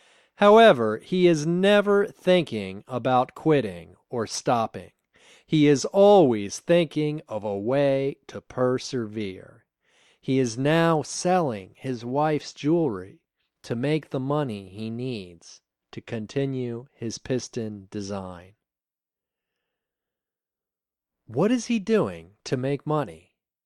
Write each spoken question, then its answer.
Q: What is he doing to make money?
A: He is selling his wife's jewelry to make money.